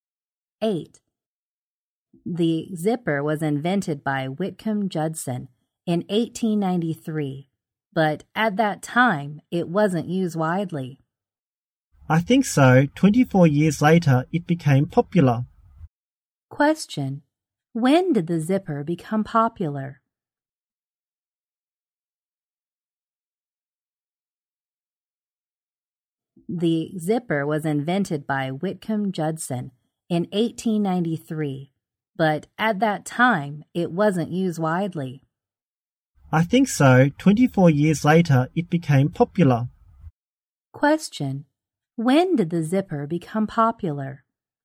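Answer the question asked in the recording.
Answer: In 1917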